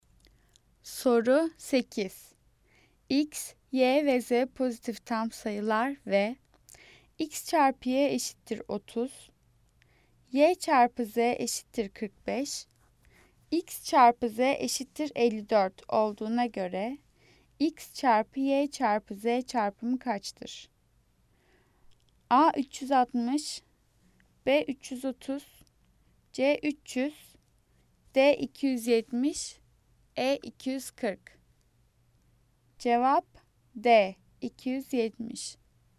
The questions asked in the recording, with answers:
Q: X çarpı Z eşittir 54 olduğuna göre X çarpı Y çarpı Z çarpımı kaçtır?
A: Cevap D 270.